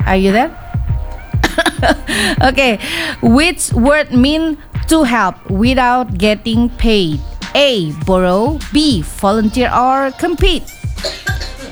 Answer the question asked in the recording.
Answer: Okay, so it's B, volunteer.